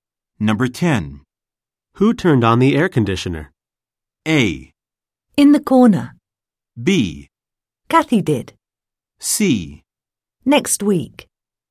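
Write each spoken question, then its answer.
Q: Who turned on the air conditioner?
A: B: Kathy did.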